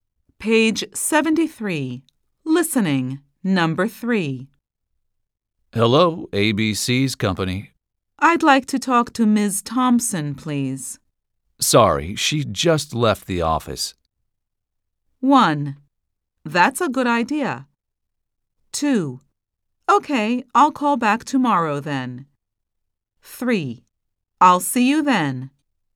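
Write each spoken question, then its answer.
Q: Sorry, she just left the office.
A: 2: Okay, I'll call back tomorrow then.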